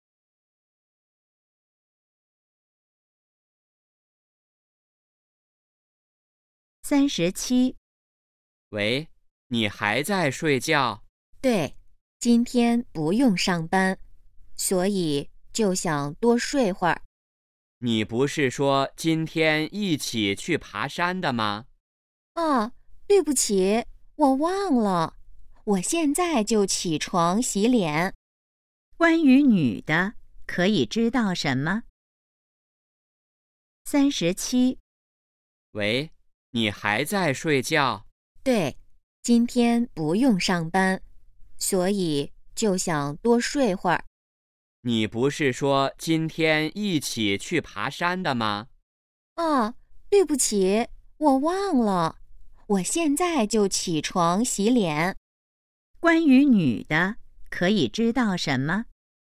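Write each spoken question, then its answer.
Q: 关于女的,可以知道什么?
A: 她忘了今天去爬山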